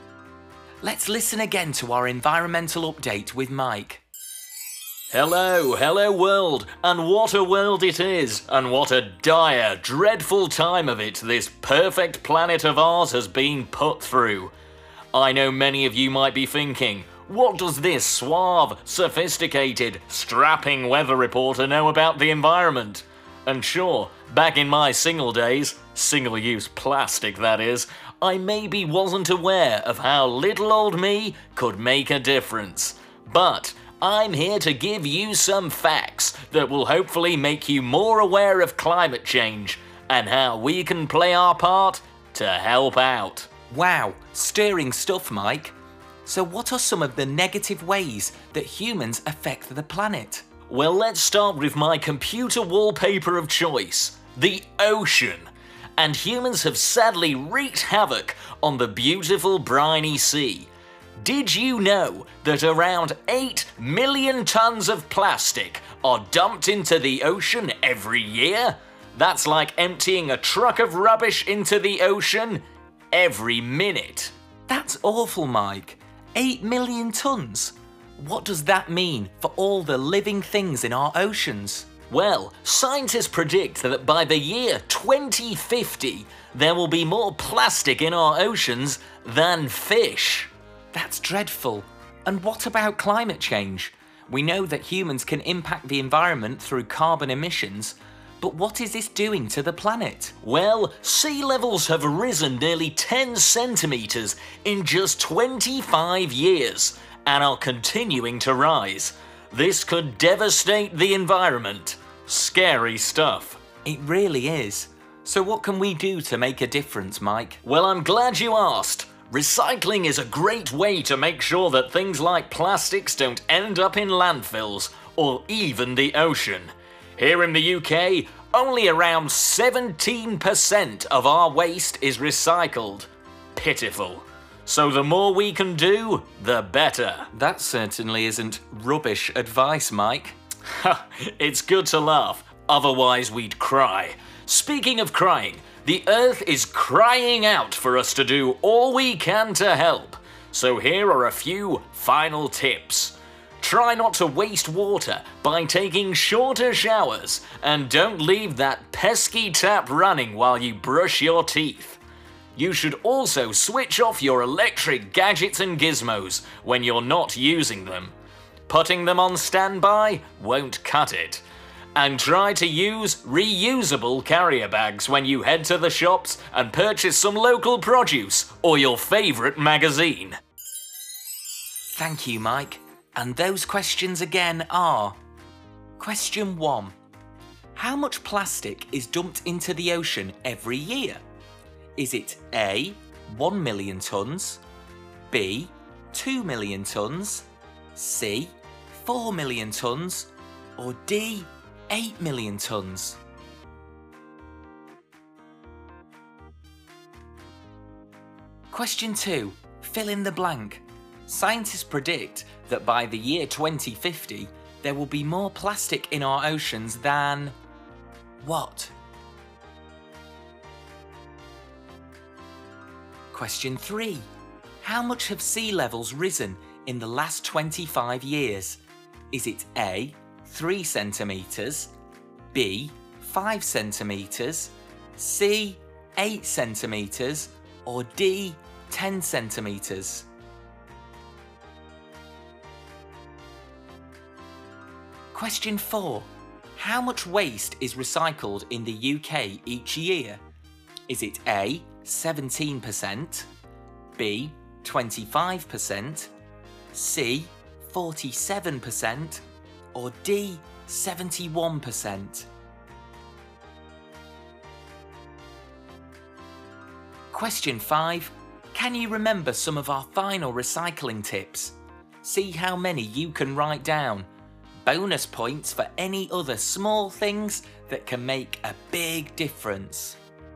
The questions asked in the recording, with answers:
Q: How much plastic is dumped into the ocean every year?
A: Around 8 million tons of plastic are dumped into the ocean every year, so the answer is D.

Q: Scientists predict that by the year 2050, there will be more plastic in our oceans than...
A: Scientists predict that by the year 2050, there will be more plastic in our oceans than fish.

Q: How much have sea levels risen in the last 25 years?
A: The answer is D, 10 centimetres in 25 years, and still rising.

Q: How much waste is recycled in the UK each year?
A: The answer is A, 17%.

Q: Can you remember some of our final recycling tips?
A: There was trying to use less water when showering and brushing your teeth.